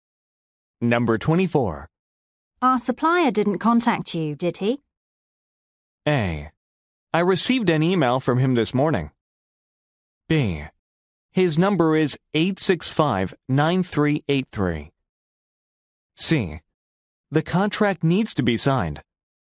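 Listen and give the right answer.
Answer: A: I received an email from him this morning.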